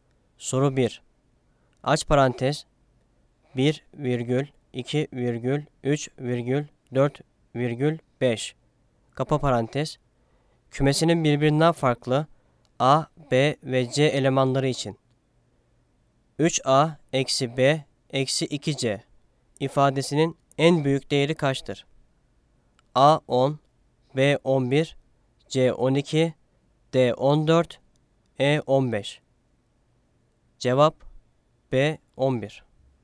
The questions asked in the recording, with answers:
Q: 3A eksi B eksi 2C ifadesinin en büyük değeri kaçtır?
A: Cevap B 11.